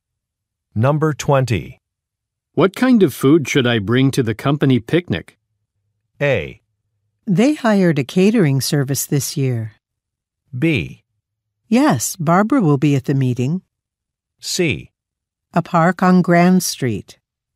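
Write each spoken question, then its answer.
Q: What kind of food should I bring to the company picnic?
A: A: They hired a catering service this year.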